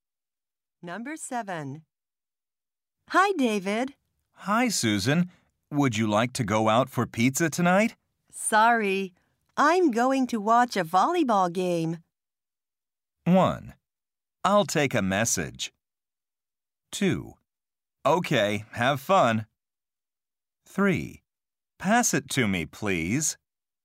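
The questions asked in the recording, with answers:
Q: Sorry. I'm going to watch a volleyball game.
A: 2: Okay, have fun.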